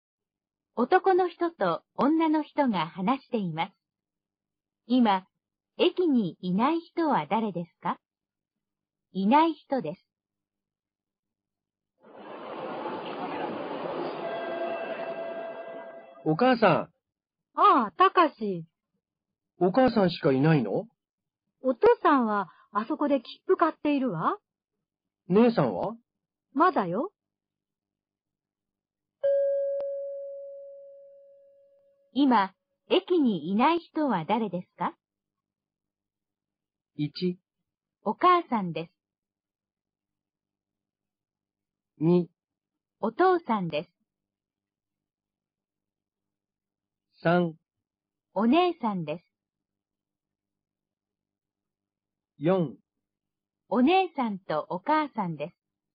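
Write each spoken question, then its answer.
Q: 今、駅にいない人は誰ですか?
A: 3: お姉さんです。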